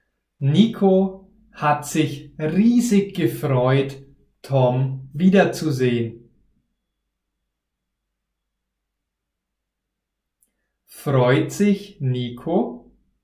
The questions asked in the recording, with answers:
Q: Freut sich Nico?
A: Ja, er freut sich. Er hat sich riesig gefreut, Tom wiederzusehen.